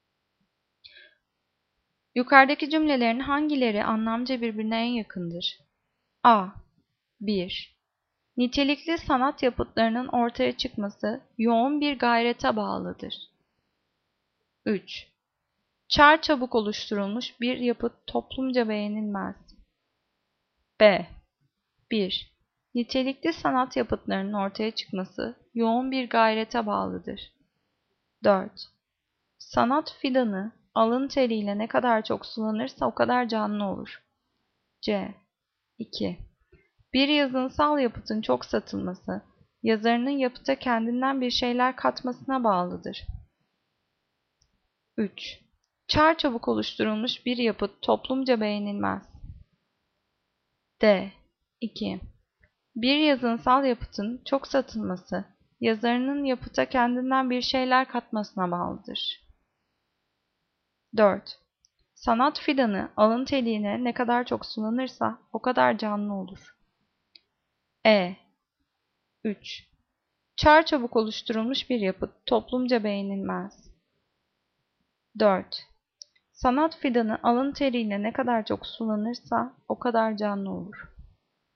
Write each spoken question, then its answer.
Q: Yukarıdaki cümlelerin hangileri anlamca birbirine en yakındır?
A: Cevap B. 1. Nitelikli sanat yapıtlarının ortaya çıkması yoğun bir gayrete bağlıdır.